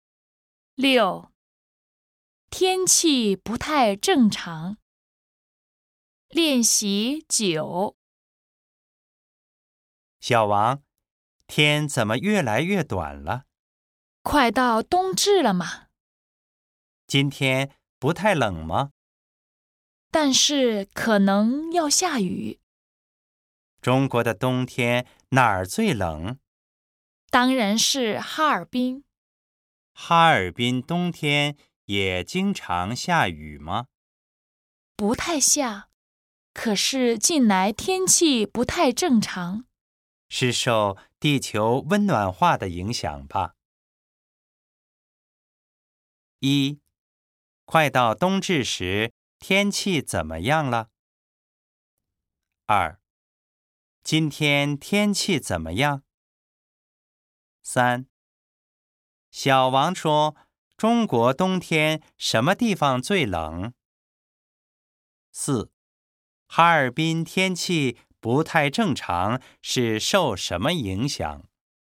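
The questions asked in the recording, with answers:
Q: 快到冬至时,天气怎么样了?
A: 天越来越短了

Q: 今天天气怎么样?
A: 不太冷,但是可能要下雨

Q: 小王说,中国冬天什么地方最冷?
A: 哈尔滨

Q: 哈尔滨天气不太正常,是受什么影响?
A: 地球温暖化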